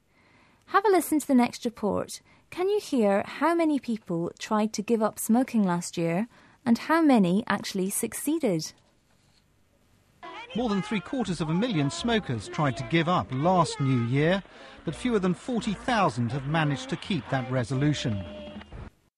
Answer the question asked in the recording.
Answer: Only about 5% of the smokers managed to keep their resolution.